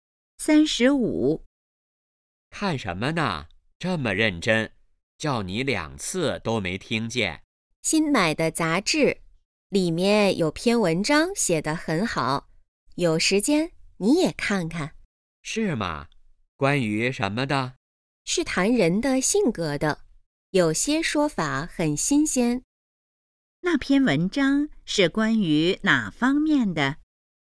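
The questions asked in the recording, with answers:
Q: 那篇文章是关于哪方面的?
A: 人的性格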